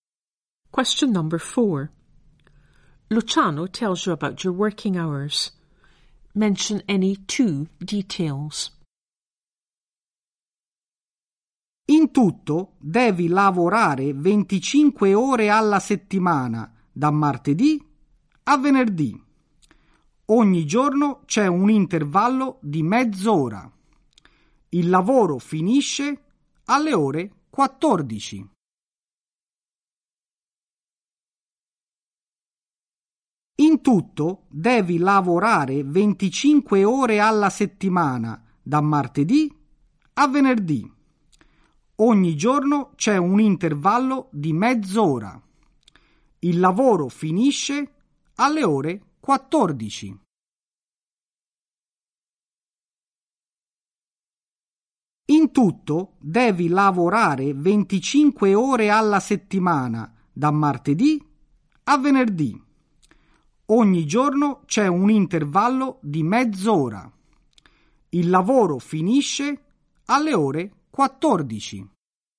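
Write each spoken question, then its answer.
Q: Luciano tells you about your working hours.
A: 25 hours a week, Tuesday to Friday, half-hour break daily, finishes at 2 pm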